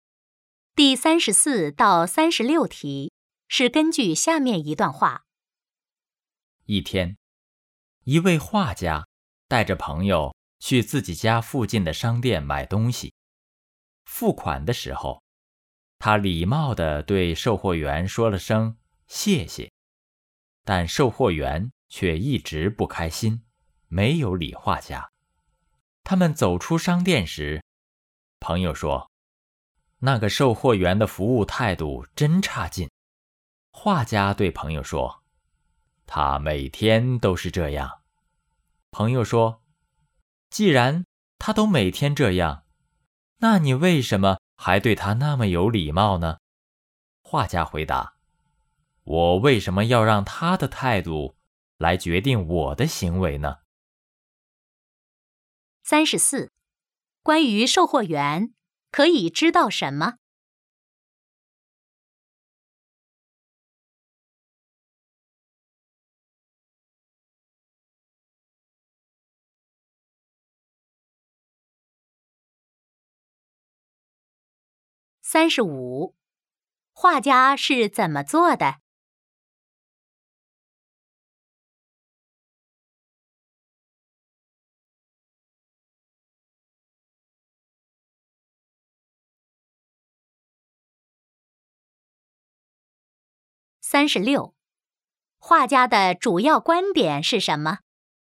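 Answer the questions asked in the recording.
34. 服务态度很差,每天都不开心
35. 礼貌地对售货员说谢谢
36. 不让别人的态度决定自己的行为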